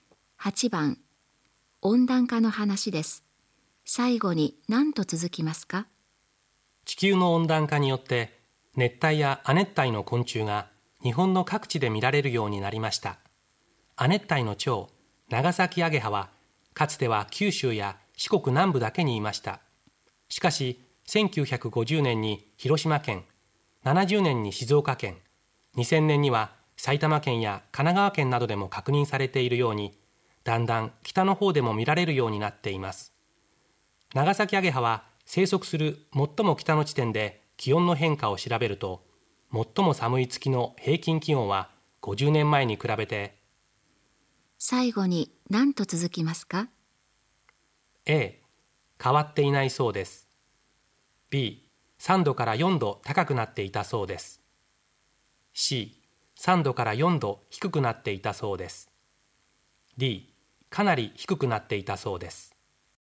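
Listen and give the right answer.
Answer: B: 3度から4度高くなっていたそうです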